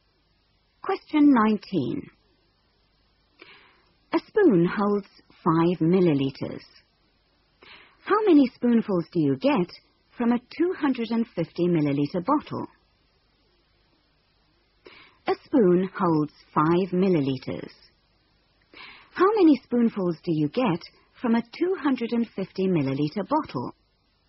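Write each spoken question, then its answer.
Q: How many spoonfuls do you get from a 250-milliliter bottle?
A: 50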